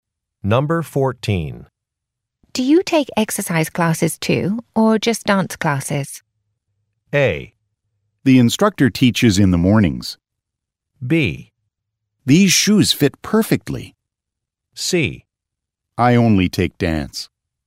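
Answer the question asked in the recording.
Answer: C: I only take dance.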